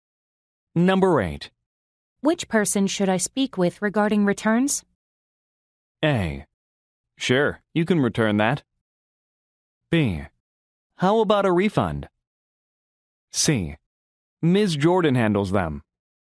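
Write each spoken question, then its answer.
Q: Which person should I speak with regarding returns?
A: C: Ms. Jordan handles them.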